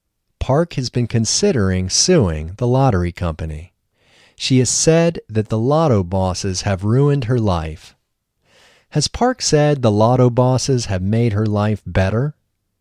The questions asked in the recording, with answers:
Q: Has Park said the lotto bosses have made her life better?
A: No, Park hasn't said that the lotto bosses have made her life better. She has said that the lotto bosses have ruined her life.